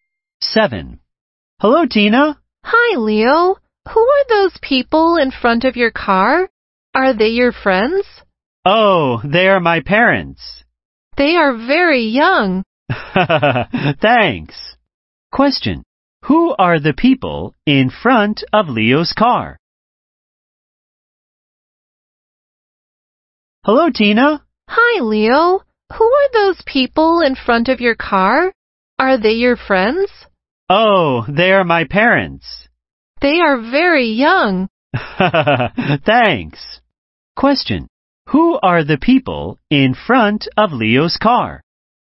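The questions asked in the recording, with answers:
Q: Who are the people in front of Leo's car?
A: His parents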